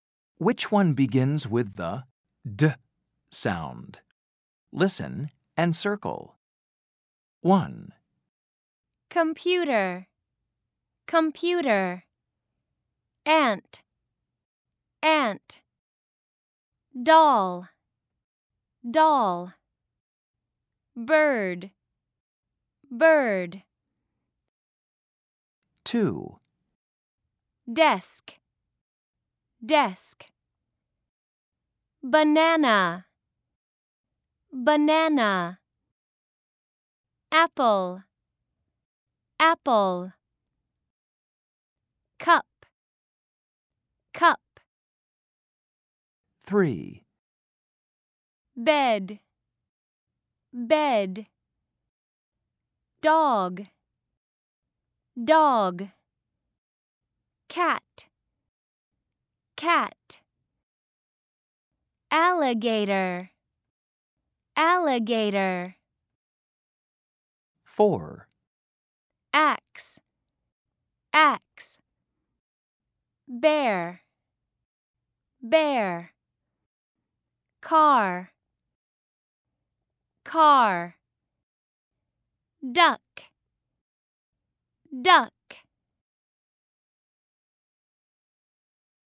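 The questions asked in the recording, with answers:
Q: Which one begins with the D sound?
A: Doll

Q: Which one begins with the D sound?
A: Desk

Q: Which one begins with the D sound?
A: Dog

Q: Which one begins with the D sound?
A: Duck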